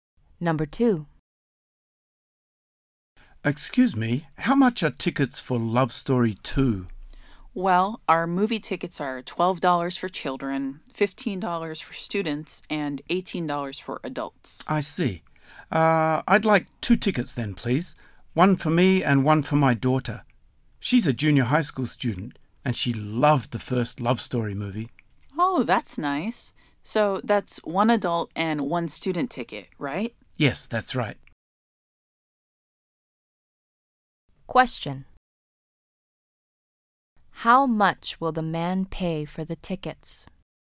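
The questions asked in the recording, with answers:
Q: How much will the man pay for the tickets?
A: $33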